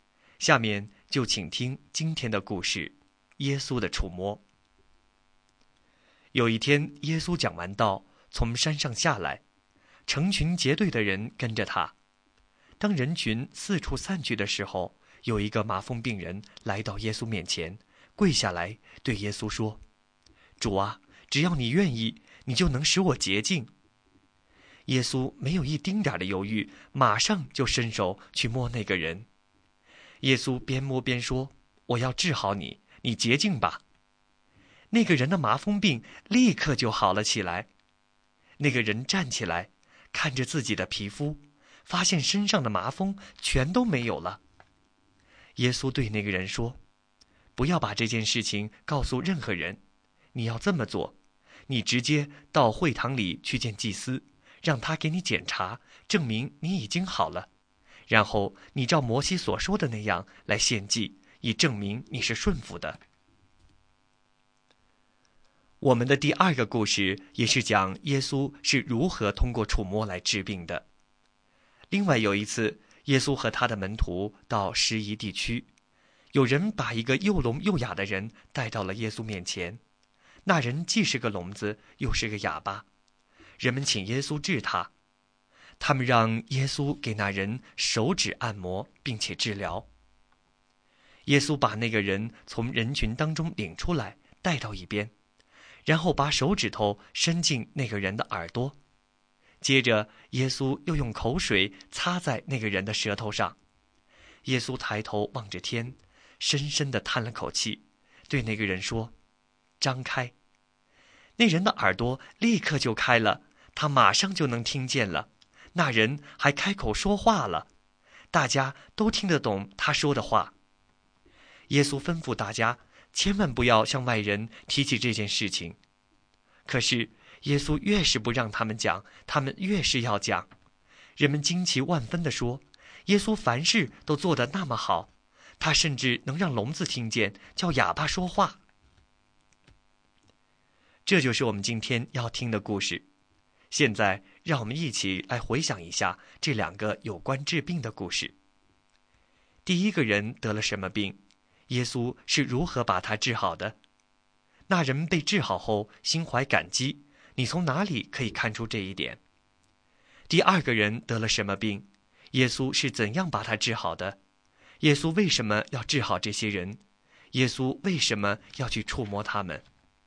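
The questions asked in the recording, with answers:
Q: 第一个人得了什么病?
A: 麻风病

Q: 耶稣是如何把他治好的?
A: 耶稣伸手摸他,说:我要治好你,你洁净吧

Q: 第二个人得了什么病?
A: 又聋又哑

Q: 耶稣是怎样把他治好的?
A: 把手指伸进他的耳朵,用口水擦他的舌头,望天叹气说:张开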